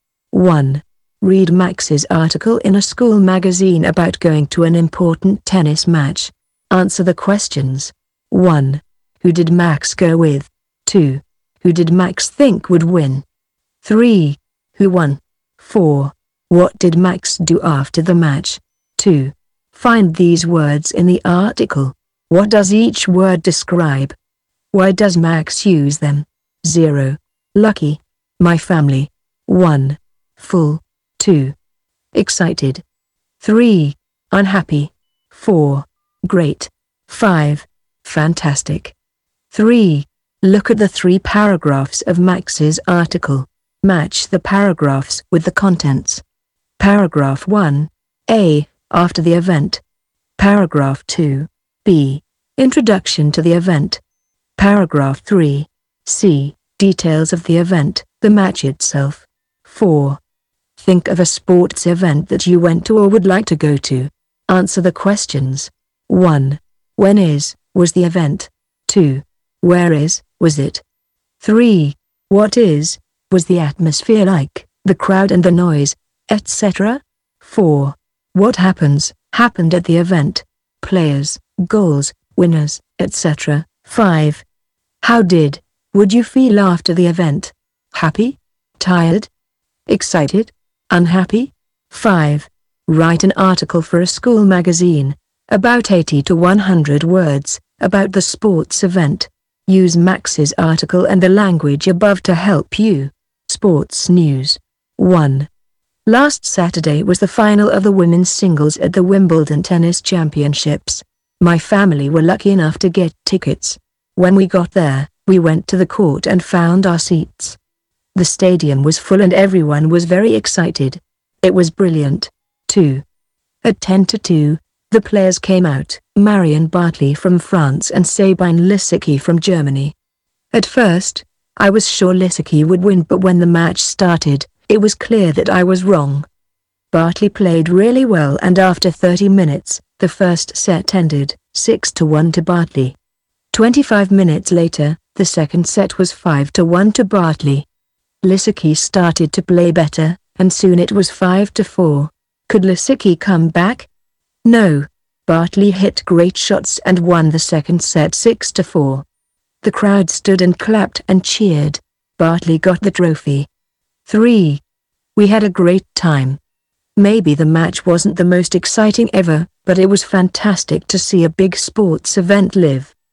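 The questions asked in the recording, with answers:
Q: Who did Max go with?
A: His family

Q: Who did Max think would win?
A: Sabine Lisicki

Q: Who won?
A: Marion Bartoli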